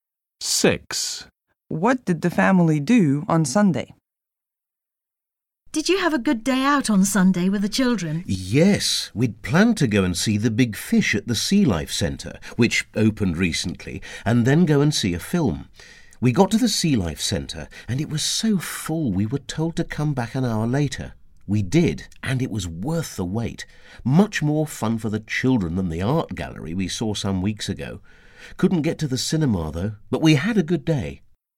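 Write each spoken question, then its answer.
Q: What did the family do on Sunday?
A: visited the Sea Life Centre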